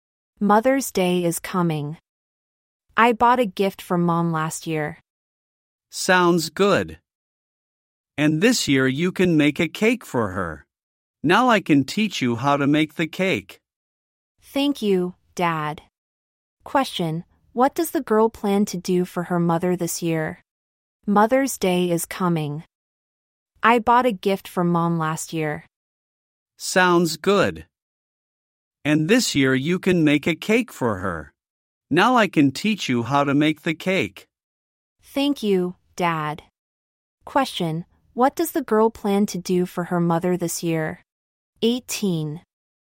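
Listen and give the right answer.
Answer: Make a cake for her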